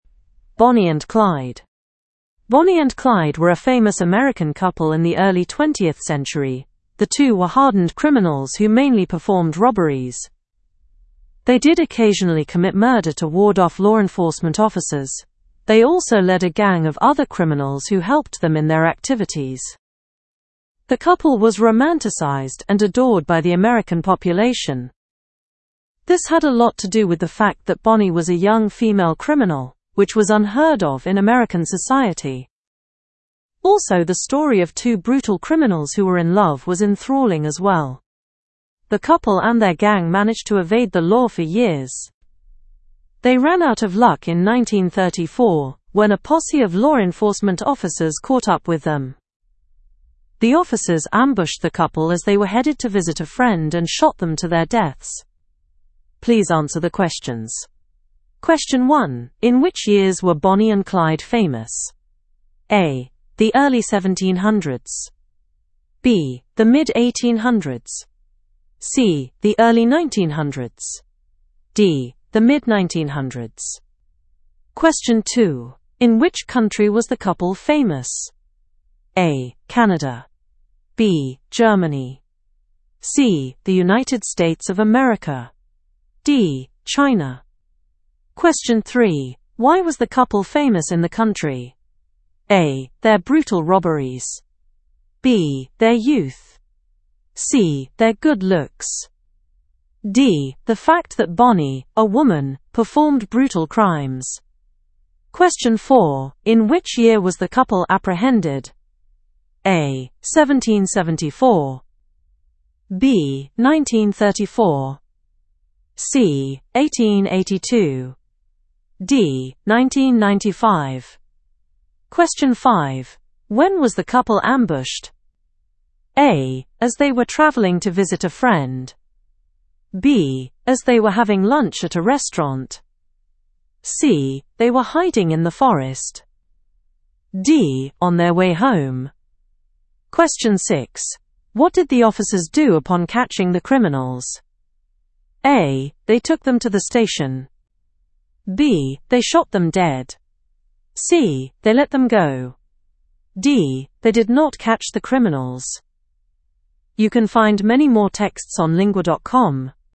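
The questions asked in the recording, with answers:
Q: In which years were Bonnie and Clyde famous?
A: C: The early 1900s.

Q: In which country was the couple famous?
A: C: The United States of America.

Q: Why was the couple famous in the country?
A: D: The fact that Bonnie, a woman, performed brutal crimes.

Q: In which year was the couple apprehended?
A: B: 1934.

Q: When was the couple ambushed?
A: A: As they were traveling to visit a friend.

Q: What did the officers do upon catching the criminals?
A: B: They shot them dead.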